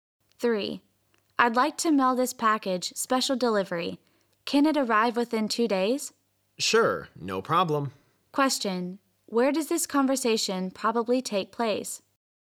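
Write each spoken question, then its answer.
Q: Where does this conversation probably take place?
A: At a post office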